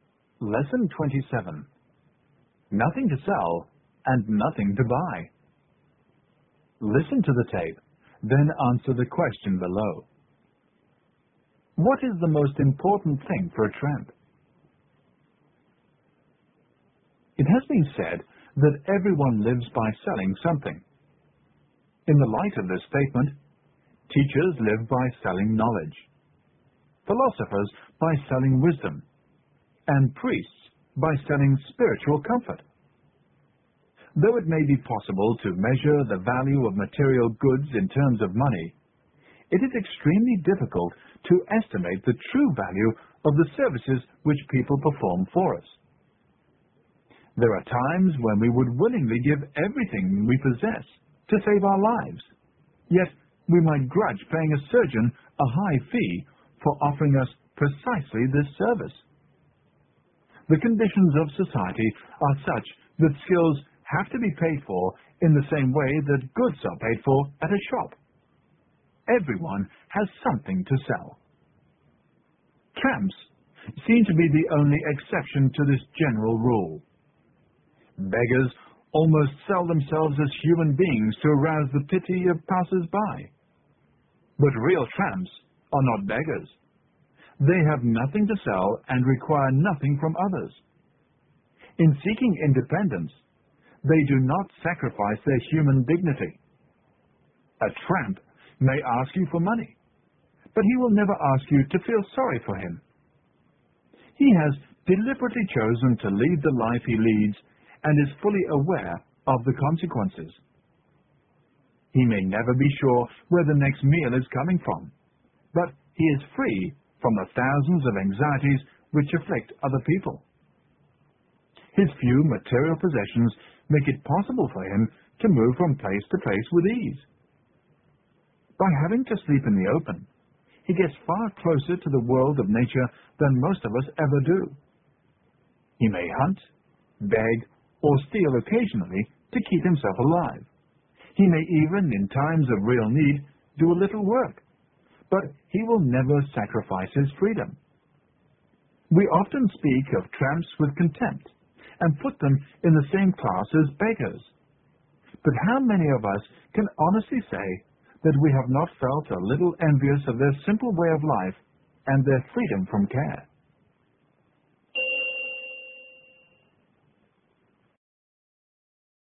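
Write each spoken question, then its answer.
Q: What is the most important thing for a tramp?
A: His freedom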